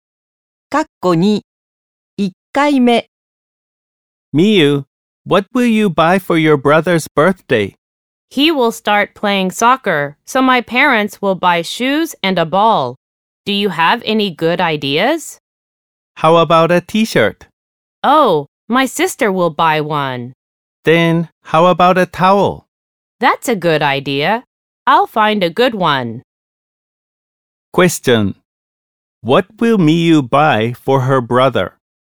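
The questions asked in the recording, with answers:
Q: What will Miu buy for her brother?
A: A towel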